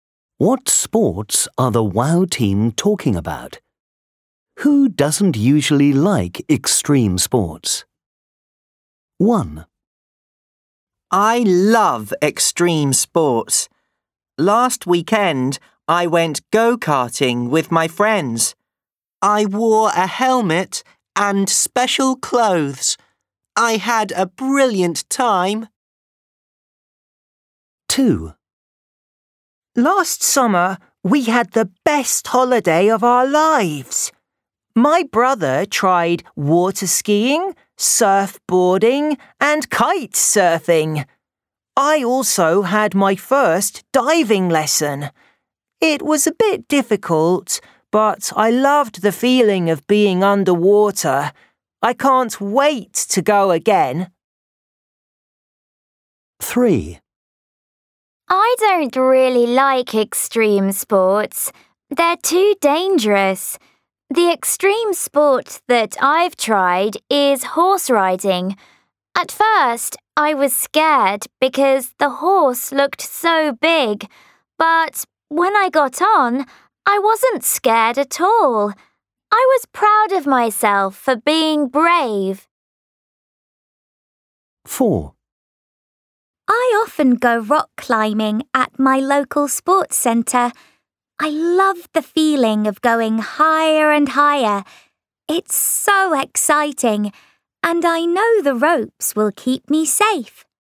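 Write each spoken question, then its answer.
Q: What sports are the WOW team talking about?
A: Go-karting, water skiing, surfboarding, kite surfing, diving, horse riding and rock climbing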